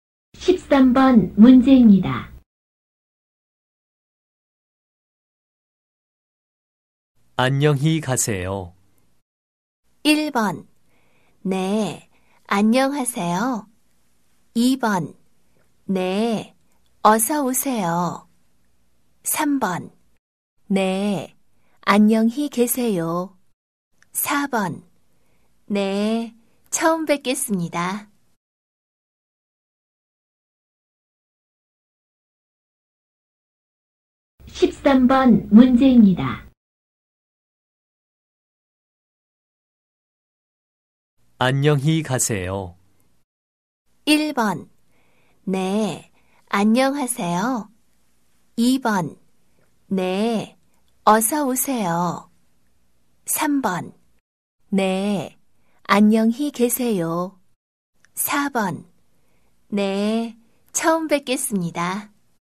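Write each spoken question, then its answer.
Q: 안녕히 가세요.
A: 3: 네, 안녕히 계세요.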